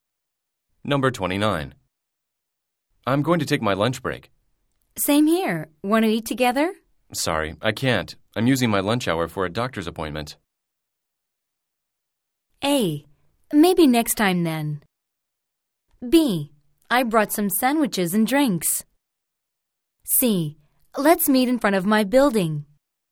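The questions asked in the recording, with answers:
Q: Sorry, I can't. I'm using my lunch hour for a doctor's appointment.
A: A: Maybe next time then.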